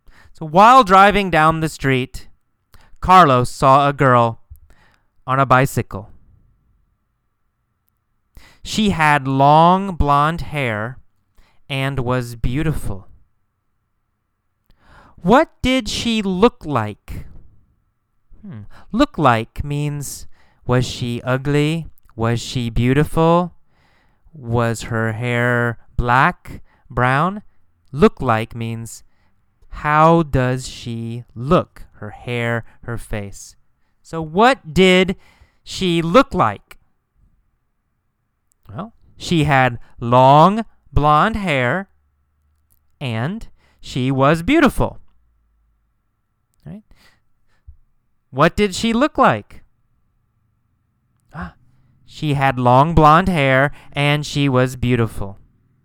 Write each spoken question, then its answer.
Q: What did she look like?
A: She had long blonde hair and she was beautiful.